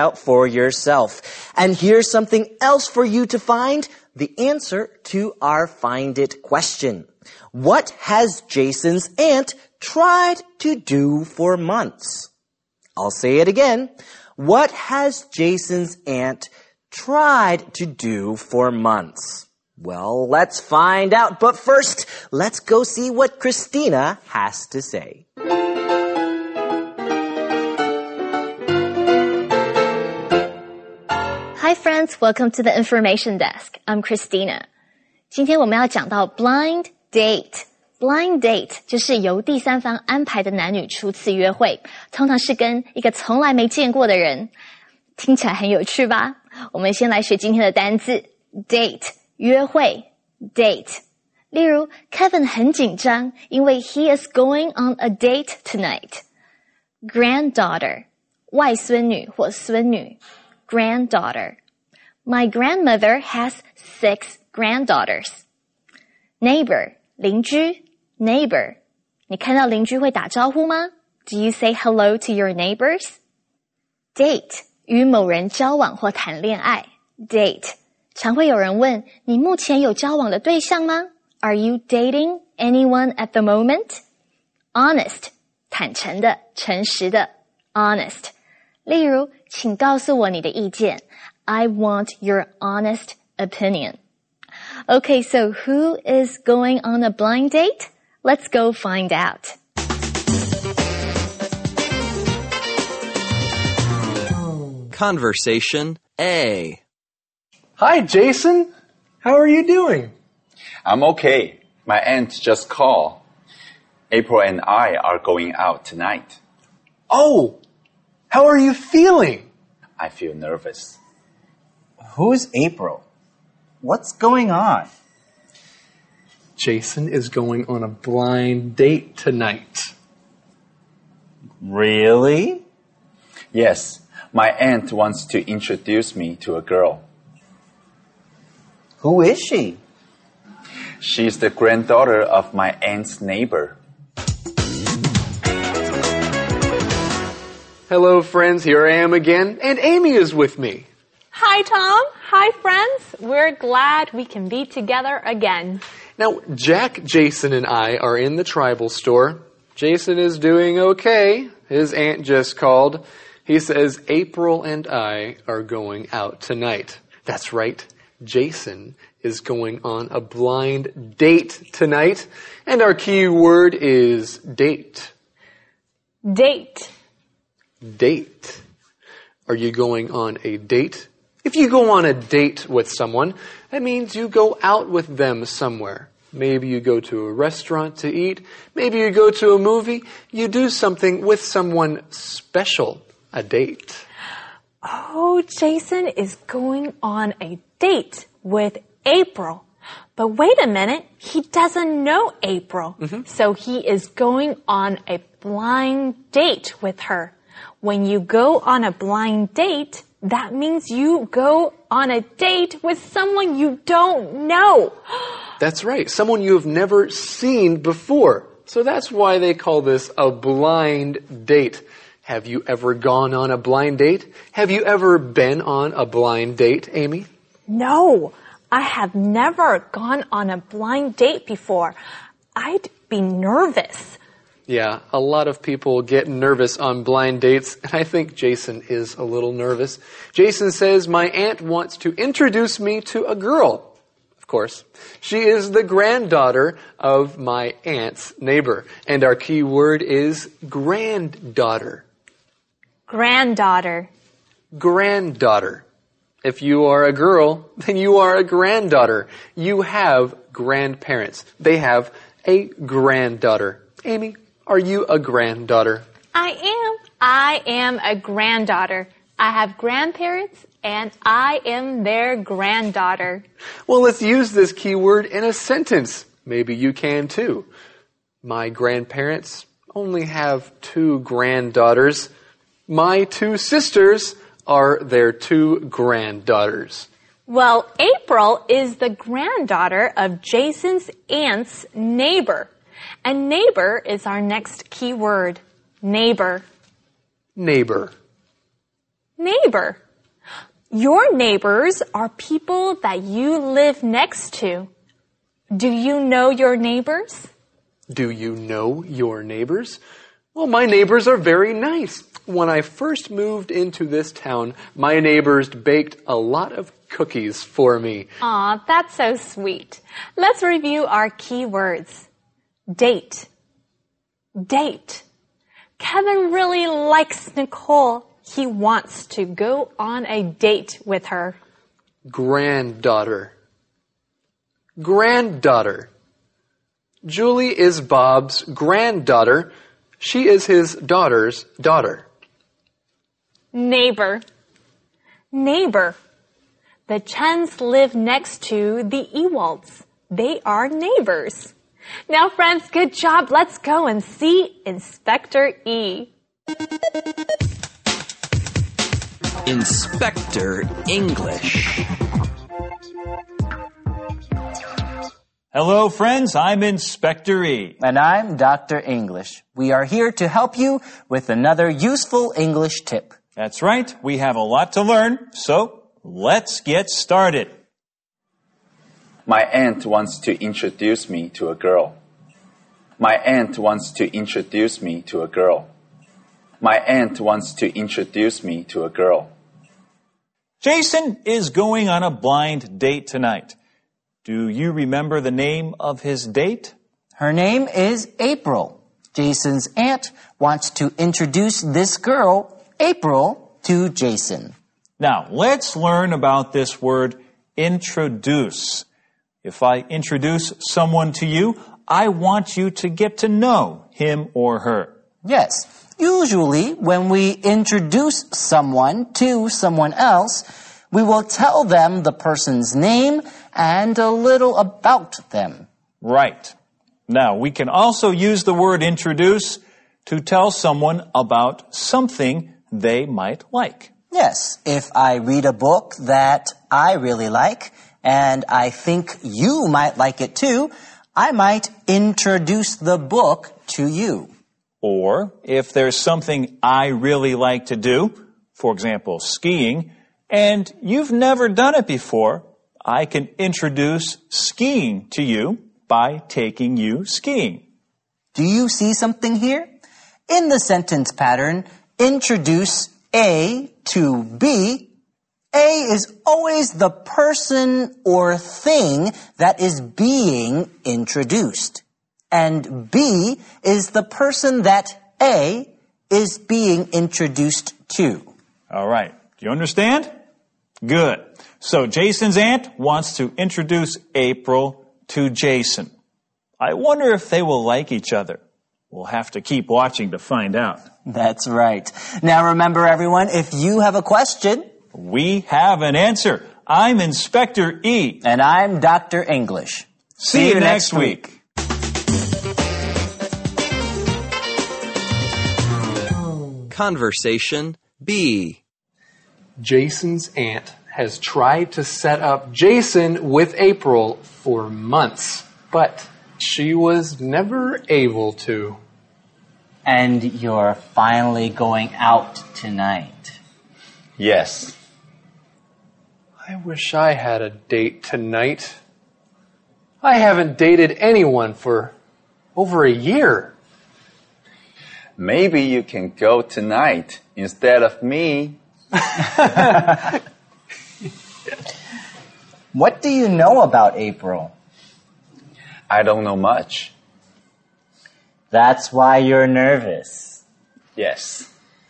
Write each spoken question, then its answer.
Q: What has Jason's aunt tried to do for months?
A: She's tried to set up Jason with April for months.